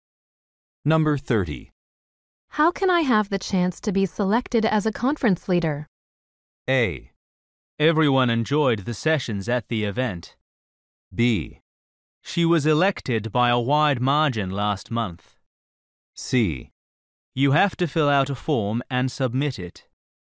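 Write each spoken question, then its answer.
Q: How can I have the chance to be selected as a conference leader?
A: C: You have to fill out a form and submit it.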